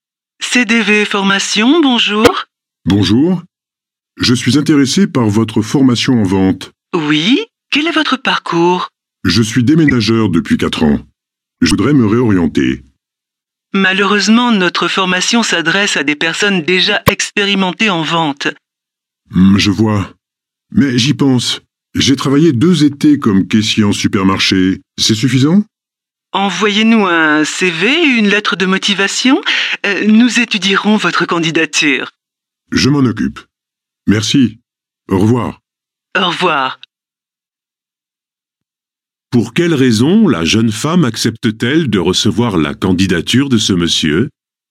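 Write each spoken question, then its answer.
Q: Pour quelle raison la jeune femme accepte-t-elle de recevoir la candidature de ce monsieur ?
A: Parce qu'il a déjà travaillé deux étés comme caissier en supermarché (une expérience dans la vente).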